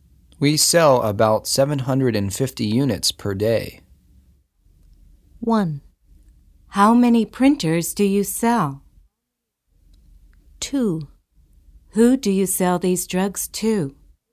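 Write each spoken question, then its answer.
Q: We sell about 750 units per day.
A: 1: How many printers do you sell?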